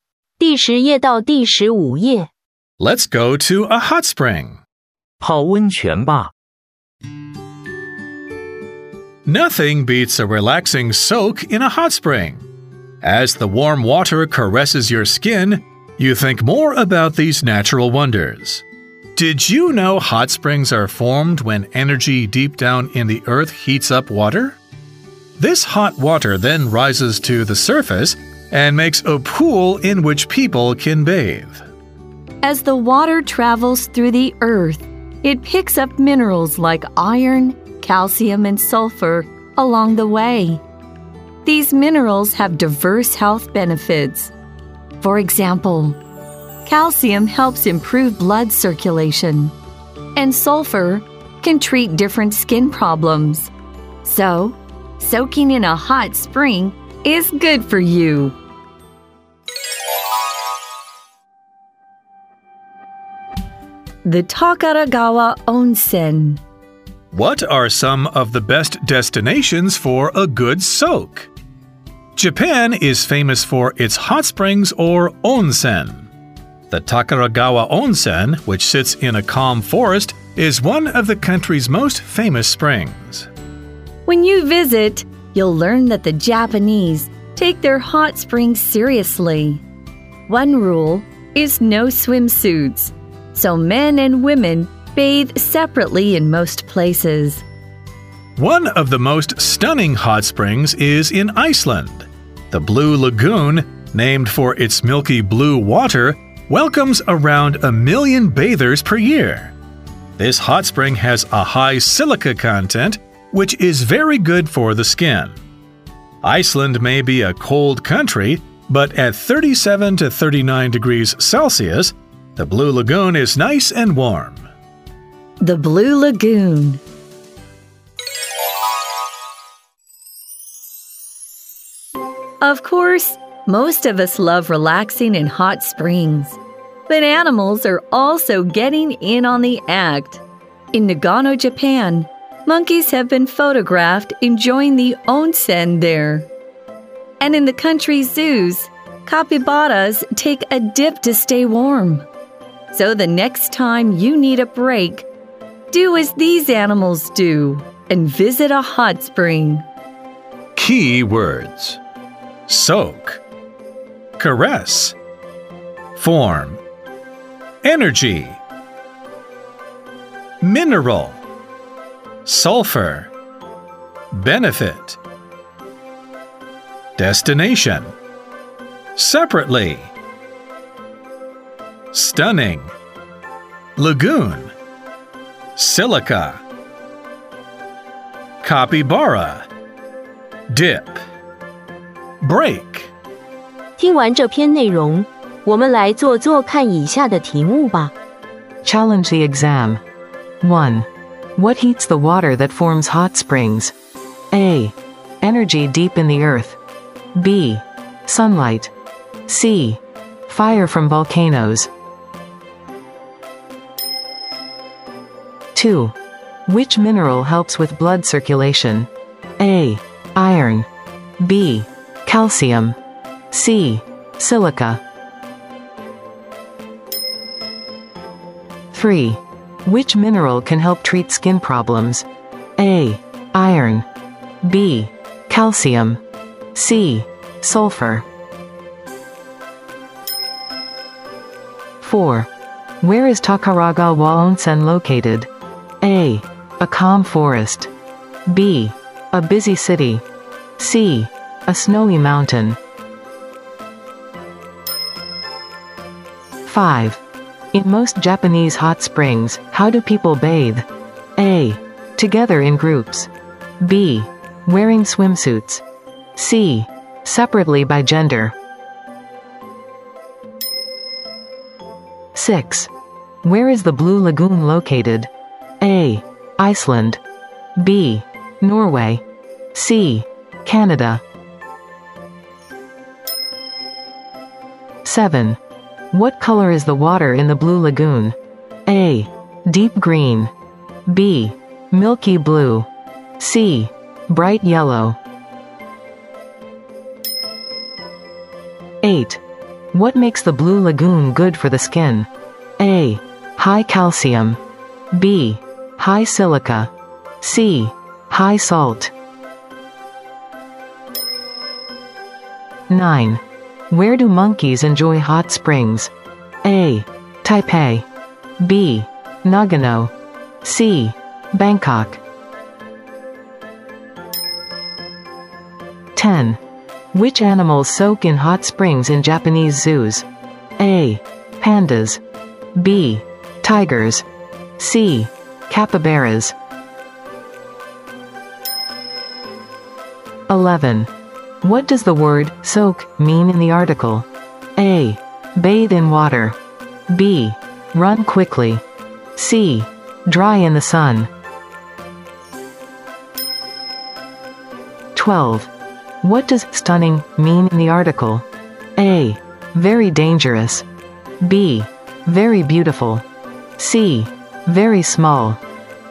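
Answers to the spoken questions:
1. A: Energy deep in the earth.
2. B: Calcium.
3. C: Sulfur.
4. A: A calm forest.
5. C: Separately by gender.
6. A: Iceland.
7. B: Milky blue.
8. B: High silica.
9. B: Nagano.
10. C: Capybaras.
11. A: Bathe in water.
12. B: Very beautiful.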